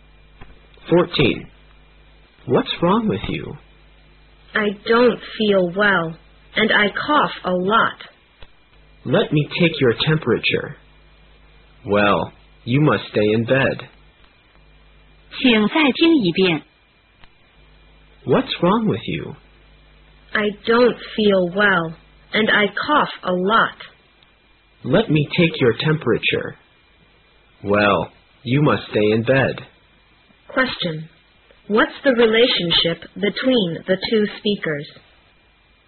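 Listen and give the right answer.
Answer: Doctor and patient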